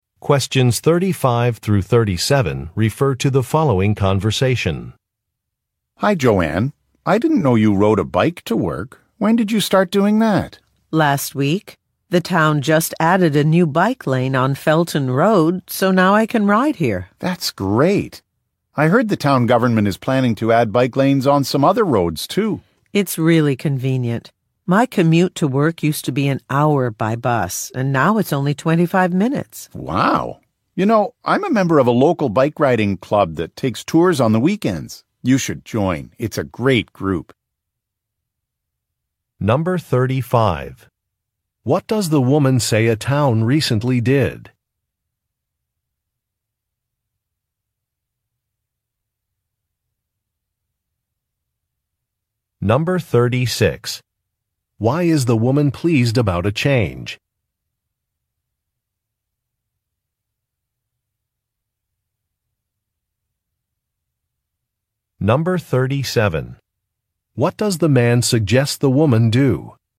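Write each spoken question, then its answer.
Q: What does the woman say a town recently did?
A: Added a new bike lane on Felton Road

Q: Why is the woman pleased about a change?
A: Her commute is shorter (25 minutes instead of an hour)

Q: What does the man suggest the woman do?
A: Join a local bike riding club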